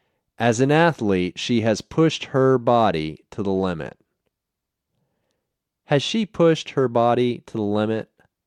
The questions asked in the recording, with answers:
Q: Has she pushed her body to the limit?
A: Yes, she has pushed her body to the limit.